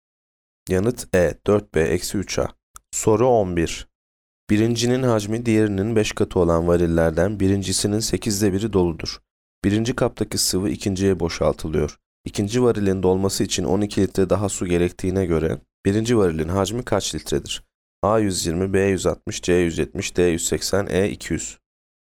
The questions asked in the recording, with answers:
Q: İkinci varilin dolması için 12 litre daha su gerektiğine göre birinci varilin hacmi kaç litredir?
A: Yanıt B 160.